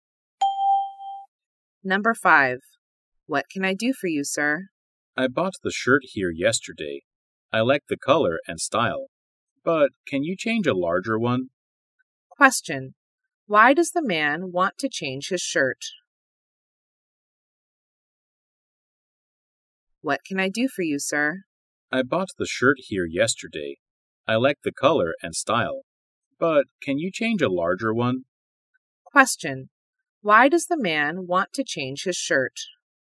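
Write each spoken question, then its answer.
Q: Why does the man want to change his shirt?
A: It is too small.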